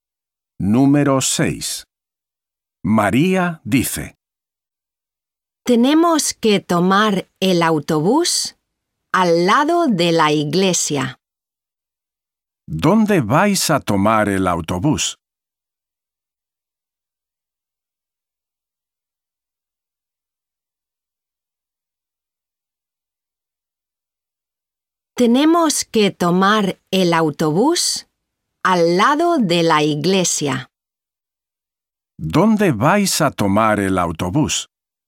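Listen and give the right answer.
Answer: Al lado de la iglesia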